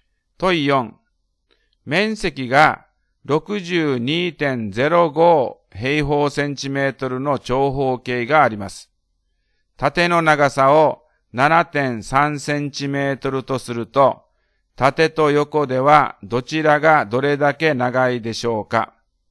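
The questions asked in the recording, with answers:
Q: 縦の長さを 7.3 センチメートルとすると、縦と横ではどちらがどれだけ長いでしょうか。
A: 横が1.2センチメートル長い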